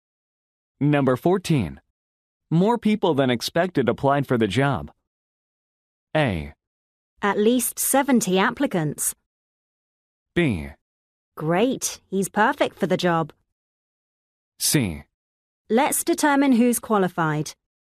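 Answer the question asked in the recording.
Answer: C: Let's determine who's qualified.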